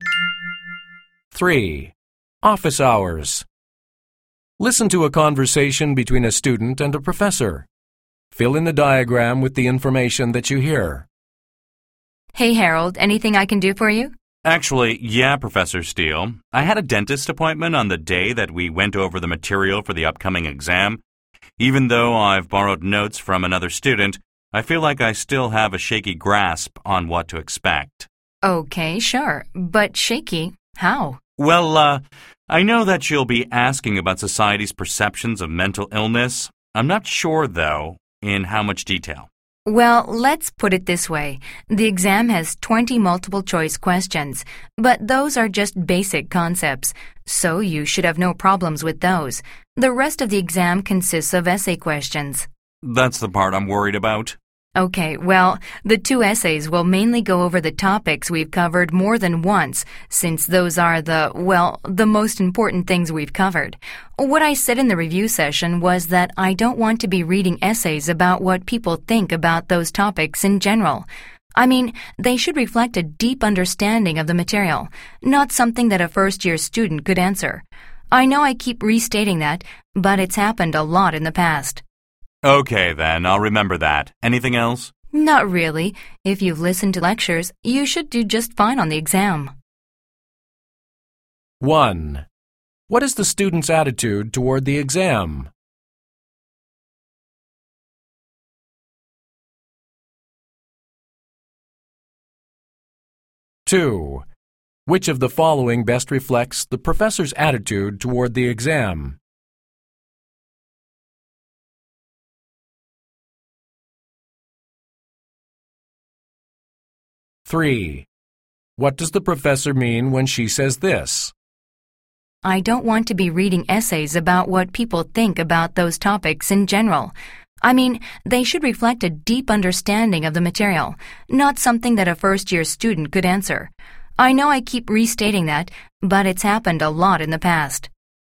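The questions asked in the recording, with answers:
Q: What is the student's attitude toward the exam?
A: He is worried about the essay part and unsure what to expect.

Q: What does the professor mean when she says this?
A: The essays must show a deep understanding of the material, not general opinions.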